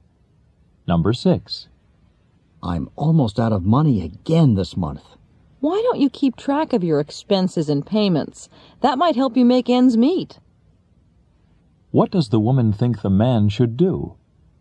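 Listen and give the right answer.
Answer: Keep track of his expenses and payments.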